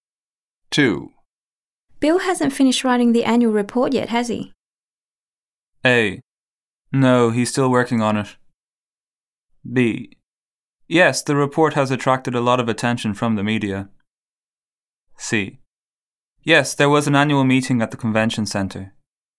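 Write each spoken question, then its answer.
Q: Bill hasn't finished writing the annual report yet, has he?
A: A: No, he's still working on it.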